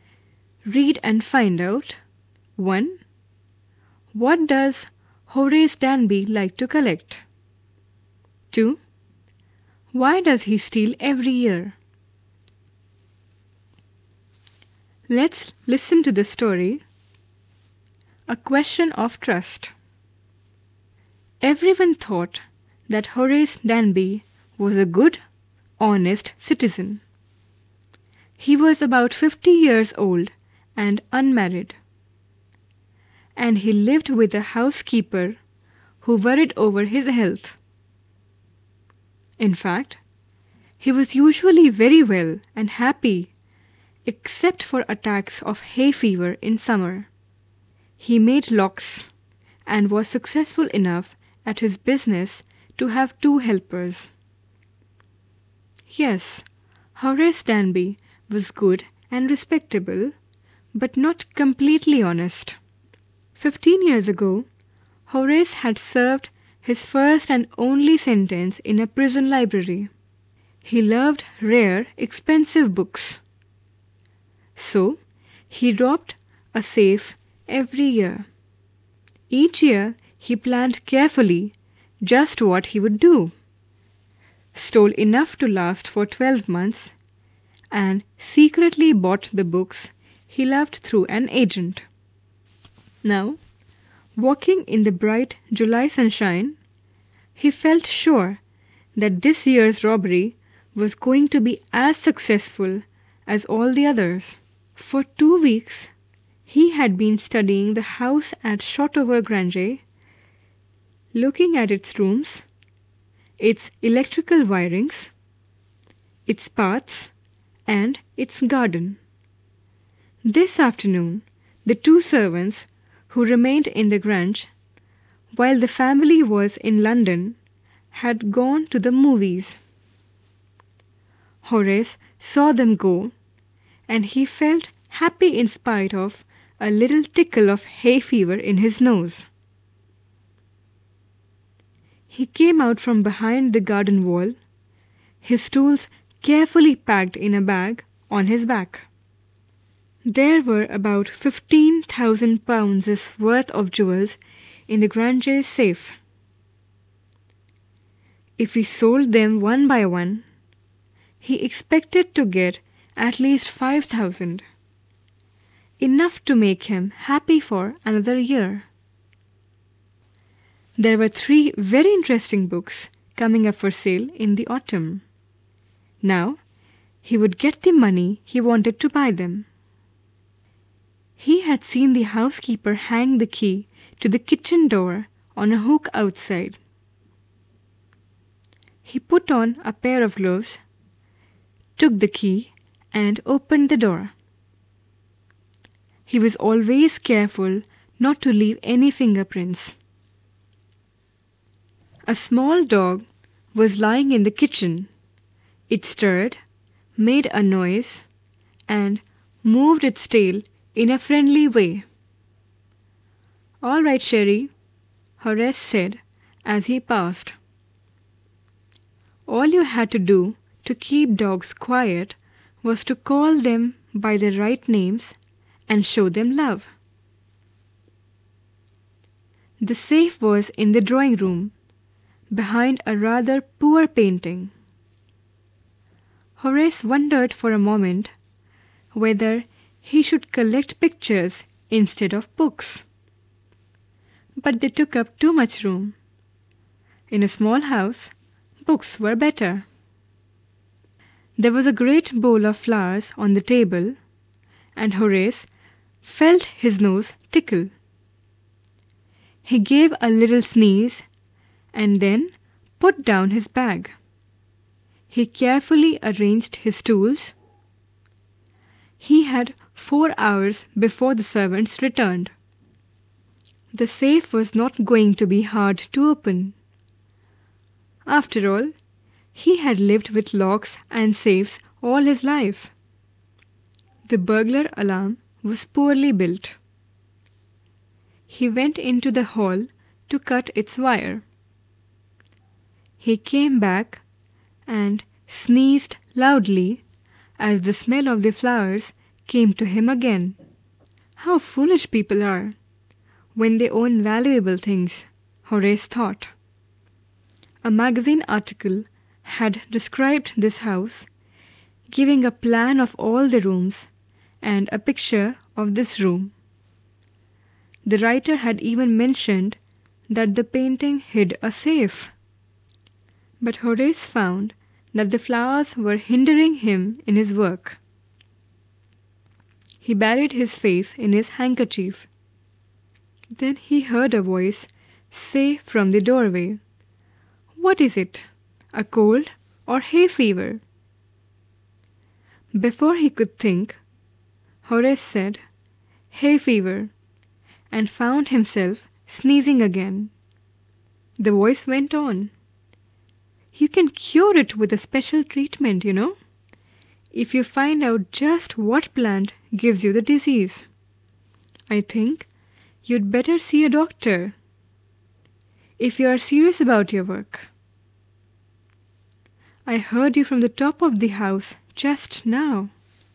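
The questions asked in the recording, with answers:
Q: What does Horace Danby like to collect?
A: Rare, expensive books

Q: Why does he steal every year?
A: To get money to buy the rare books he loves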